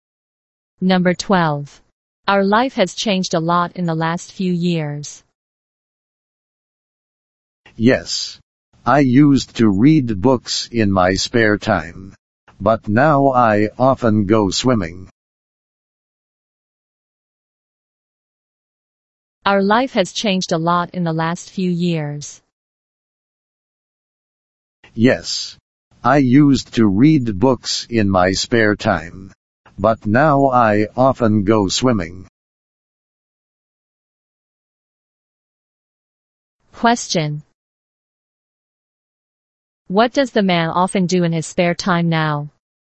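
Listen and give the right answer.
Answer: He often goes swimming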